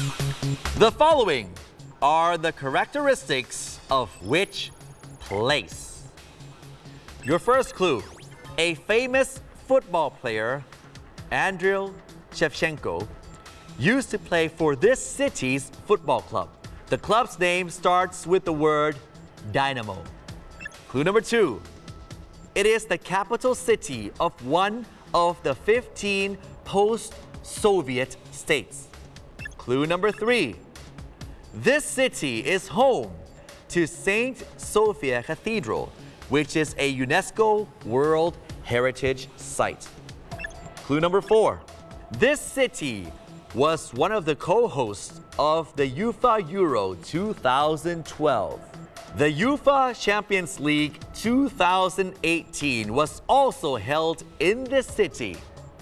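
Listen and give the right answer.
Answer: Kyiv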